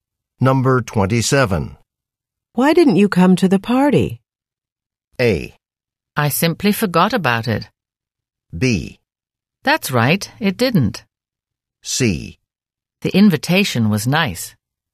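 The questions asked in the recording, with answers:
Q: Why didn't you come to the party?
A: A: I simply forgot about it.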